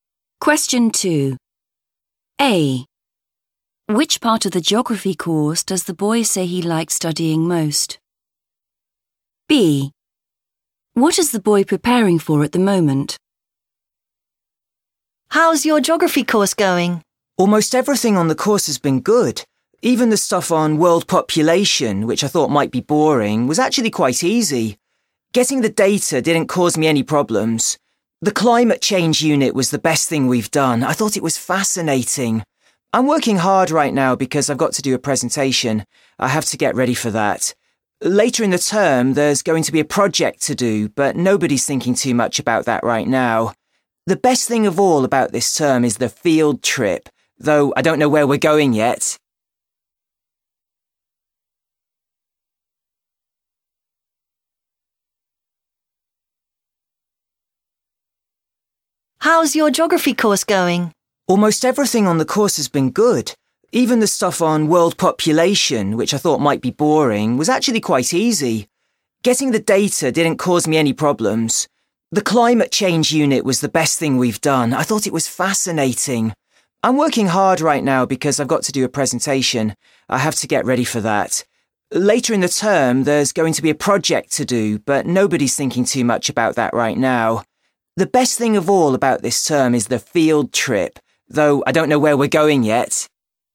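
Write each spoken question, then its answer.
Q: Which part of the geography course does the boy say he likes studying most?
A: climate change

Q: What is the boy preparing for at the moment?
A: a presentation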